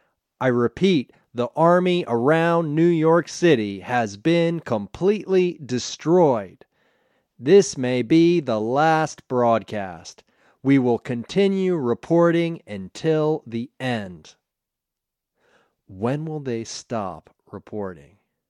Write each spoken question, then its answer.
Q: When will they stop reporting?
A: They will continue reporting until the end.